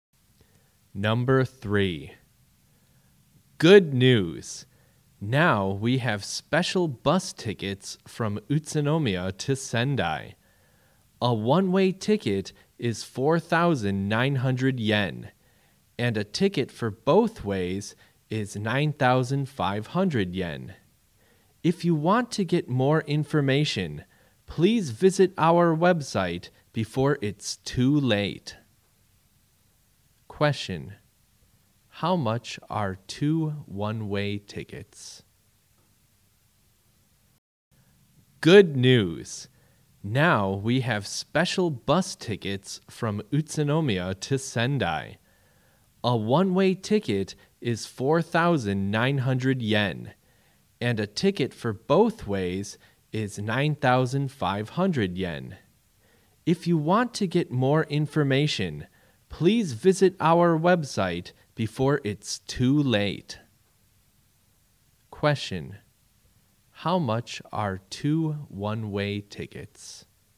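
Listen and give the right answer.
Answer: 9,800 yen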